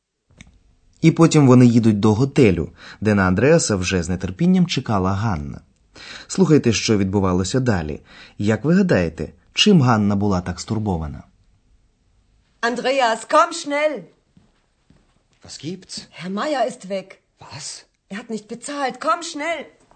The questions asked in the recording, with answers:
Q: Як ви гадаєте, чим Ганна була так стурбована?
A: Можливо, ви зрозуміли, що Ганна була стурбована тим, що з готелю кудись зник пан Майєр.